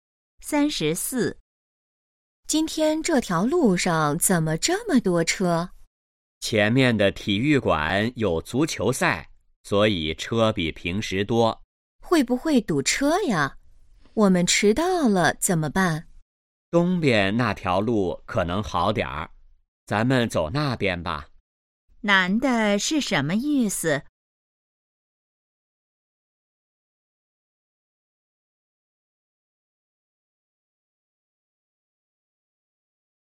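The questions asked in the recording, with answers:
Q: 男的是什么意思?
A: 走东边那条路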